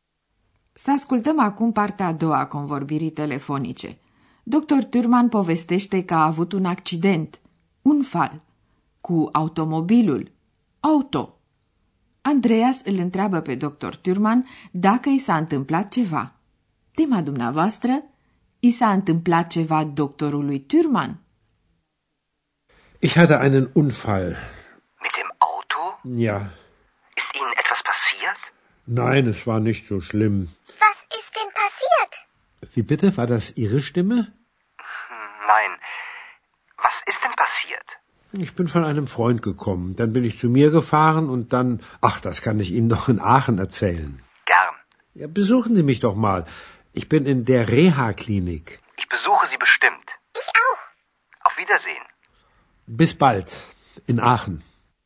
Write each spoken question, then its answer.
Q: Tema dumneavoastră, i s-a întâmplat ceva doctorului Thürmann?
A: Tot ce a putut afla deocamdată Andreas este că doctorului Thürmann nu i s-a întâmplat nimic grav.